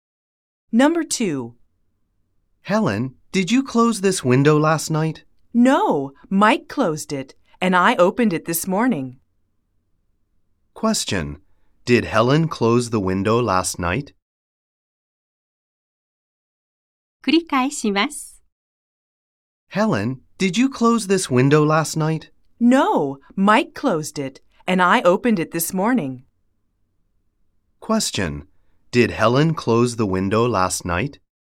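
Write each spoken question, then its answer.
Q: Did Helen close the window last night?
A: No, she didn't. Mike closed it.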